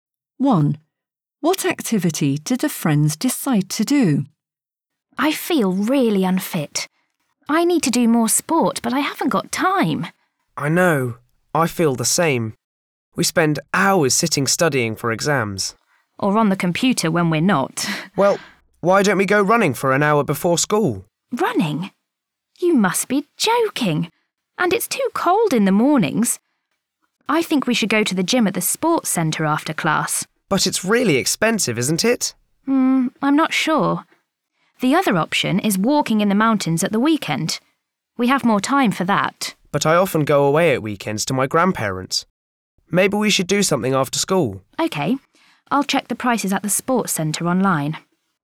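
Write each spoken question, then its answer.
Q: What activity did the friends decide to do?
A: go to the gym at the sports centre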